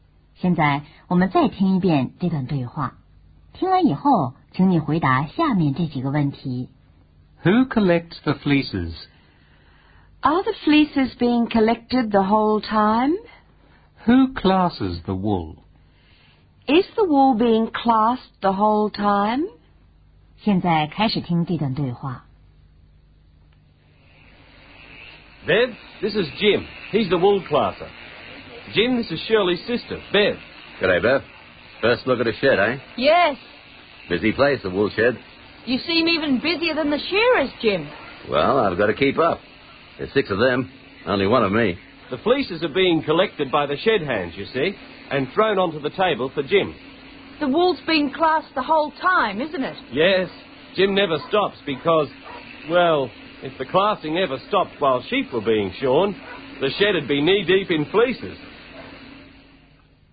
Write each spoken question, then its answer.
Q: Who collects the fleeces?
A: The shed hands collect them.

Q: Who classes the wool?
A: The wool classer does.

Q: Is the wool being classed the whole time?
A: Yes, it is. It's being classed the whole time.